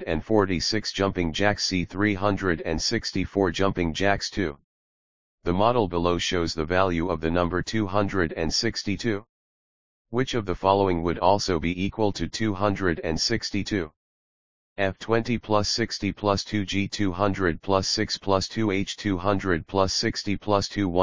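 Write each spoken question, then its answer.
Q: Which of the following would also be equal to 262?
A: H: 200 plus 60 plus 2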